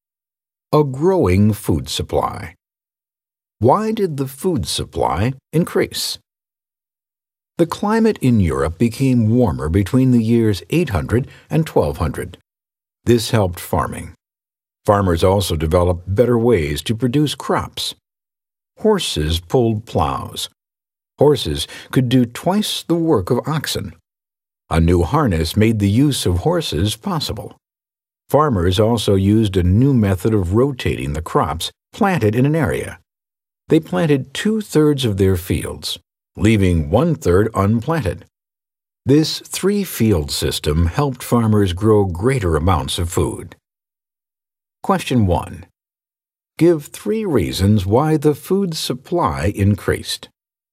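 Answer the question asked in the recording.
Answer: A warmer climate, horses pulling plows with a new harness, and the three-field system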